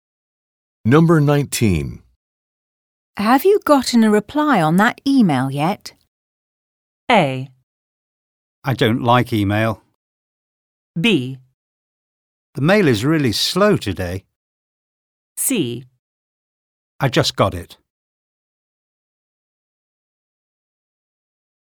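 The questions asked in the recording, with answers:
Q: Have you gotten a reply on that email yet?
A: C: I just got it.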